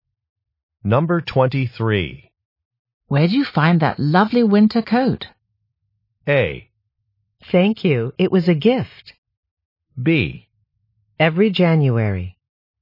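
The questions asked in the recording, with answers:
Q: Where'd you find that lovely winter coat?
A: A: Thank you, it was a gift.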